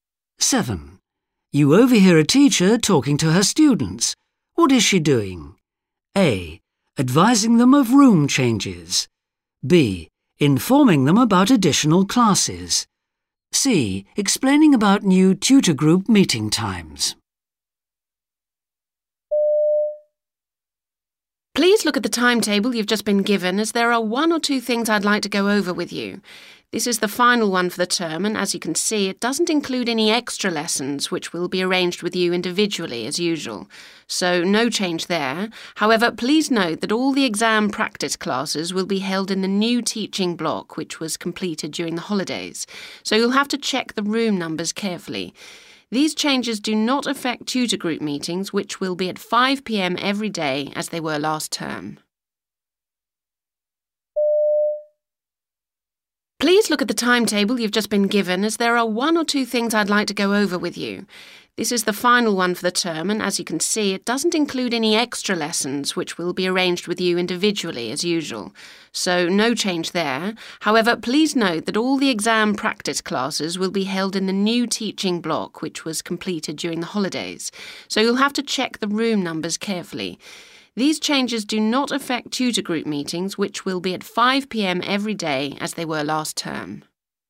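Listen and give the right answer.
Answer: A: Advising them of room changes.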